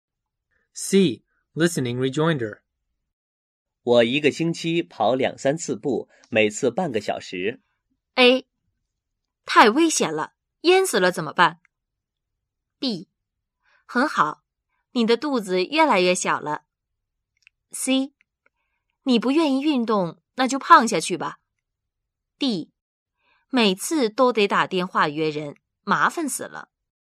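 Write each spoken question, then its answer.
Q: 我一个星期跑两三次步,每次半个小时。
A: B: 很好,你的肚子越来越小了。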